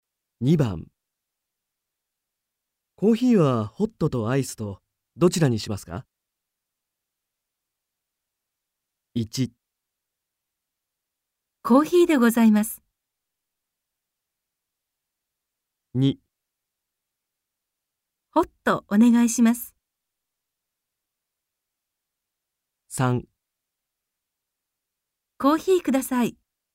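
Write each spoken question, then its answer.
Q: コーヒーはホットとアイスとどちらにしますか?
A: 2: ホットお願いします。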